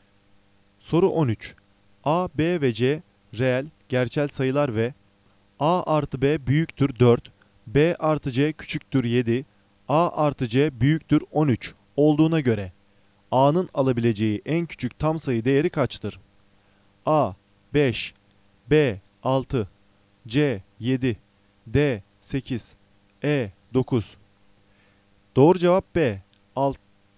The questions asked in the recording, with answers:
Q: A, B ve C reel, gerçel sayılar ve A artı B büyüktür 4, B artı C küçüktür 7, A artı C büyüktür 13 olduğuna göre A'nın alabileceği en küçük tam sayı değeri kaçtır?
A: Doğru cevap B. 6.